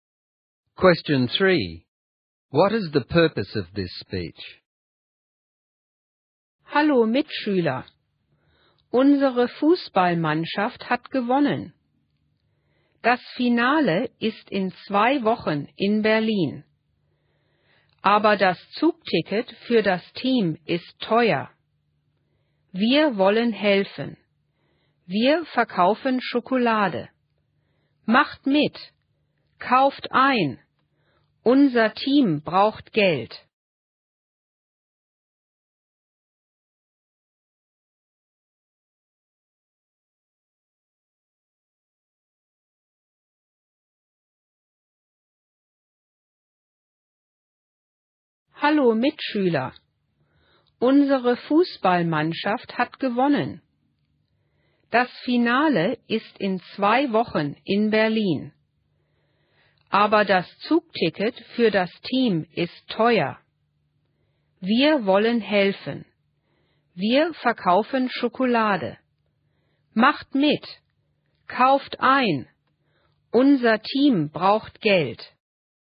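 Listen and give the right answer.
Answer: To raise money by selling chocolate for the football team's train tickets to the final in Berlin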